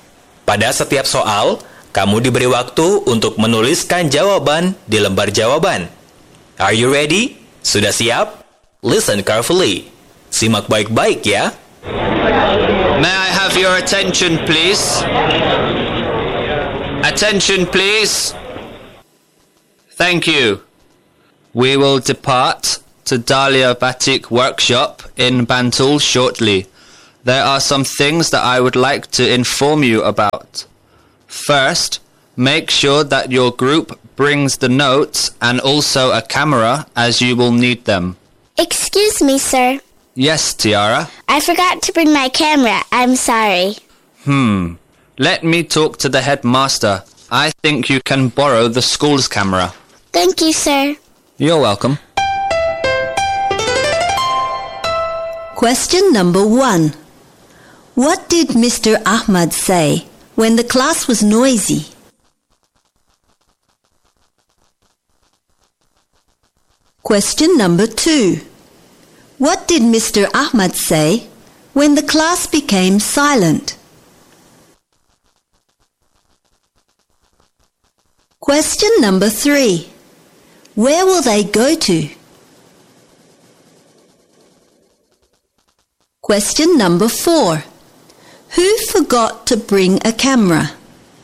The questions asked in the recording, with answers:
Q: What did Mr. Ahmad say when the class was noisy?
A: May I have your attention, please?

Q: What did Mr. Ahmad say when the class became silent?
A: Thank you.

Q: Where will they go to?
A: Dahlia Batik Workshop.

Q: Who forgot to bring a camera?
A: Tiara.